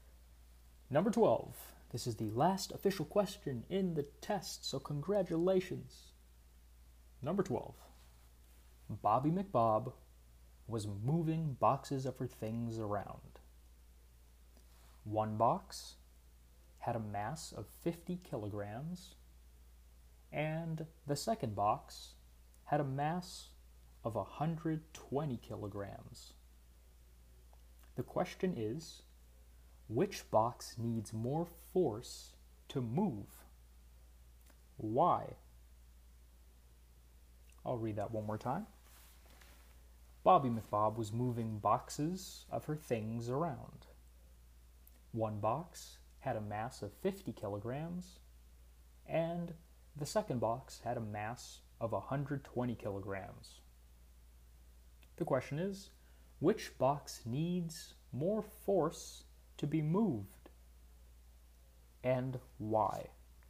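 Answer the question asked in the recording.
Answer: The 120-kilogram box, because it has more mass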